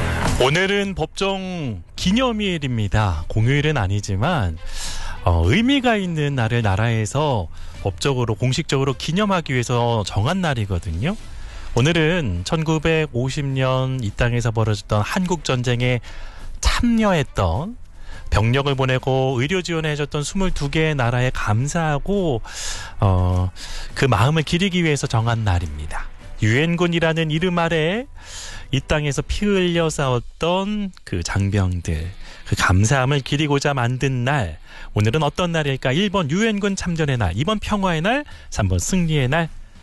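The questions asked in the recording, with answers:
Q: 오늘은 어떤 날일까? 1번 유엔군 참전의 날, 2번 평화의 날, 3번 승리의 날.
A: 1번: 유엔군 참전의 날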